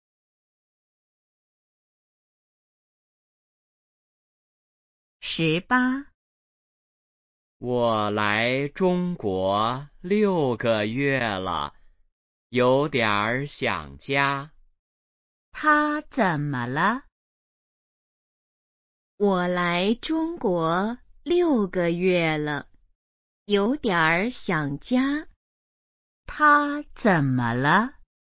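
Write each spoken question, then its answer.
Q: 他怎么了?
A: 有点儿想家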